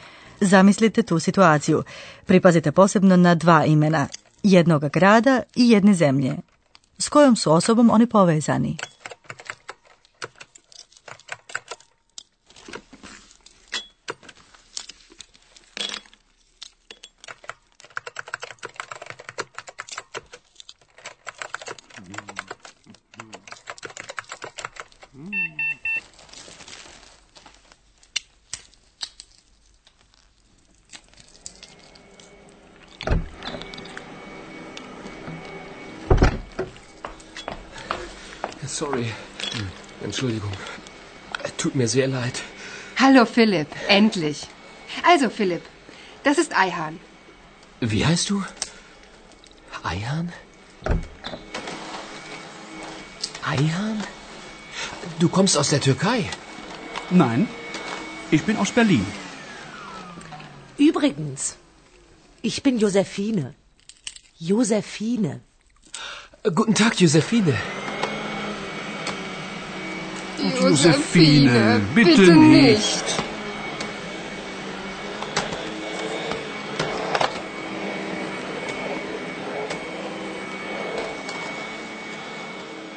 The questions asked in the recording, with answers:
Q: S kojom su osobom oni povezani?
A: Njegovi roditelji su doduše iz Turske, ali on je rođen u Berlinu.